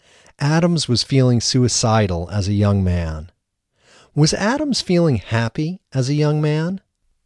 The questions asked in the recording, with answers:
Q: Was Adams feeling happy as a young man?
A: No, Adams wasn't feeling happy as a young man.